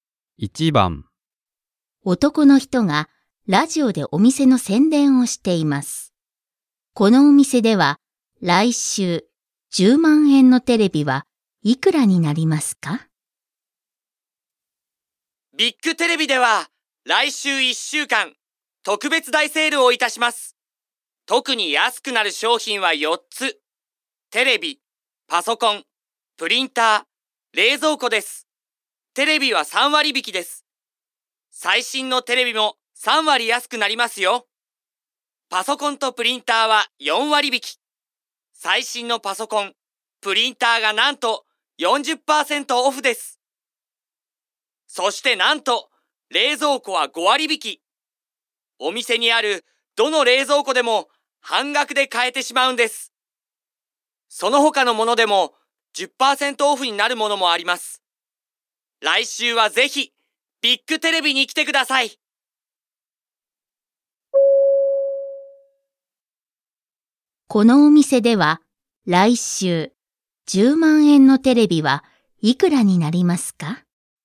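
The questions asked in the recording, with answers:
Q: このお店では来週10万円のテレビはいくらになりますか?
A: 7万円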